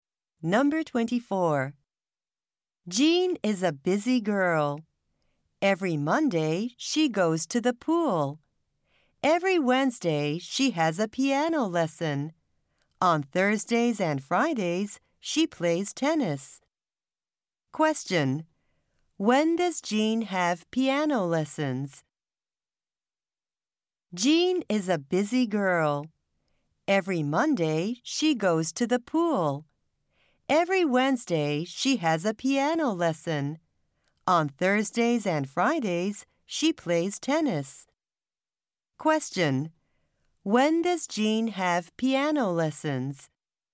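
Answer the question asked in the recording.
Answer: Every Wednesday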